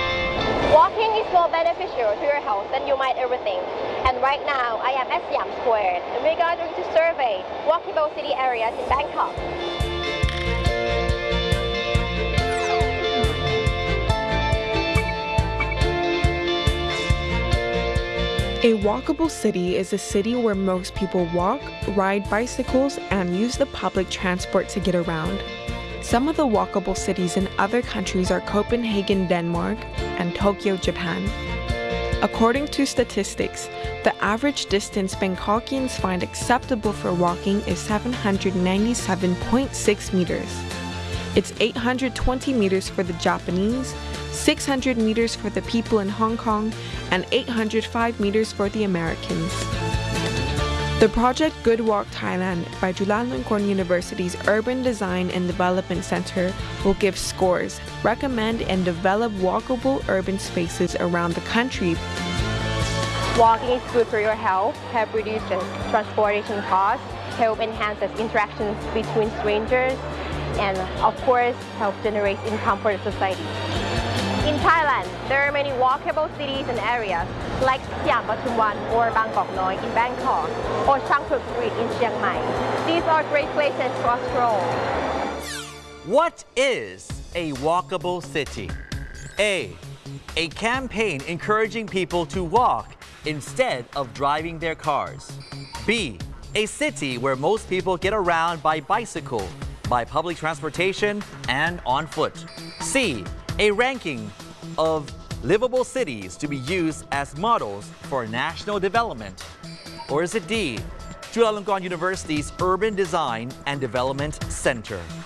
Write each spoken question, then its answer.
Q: What is a walkable city?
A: The answer is B, a city where most people get around by bicycle, by public transportation, and on foot.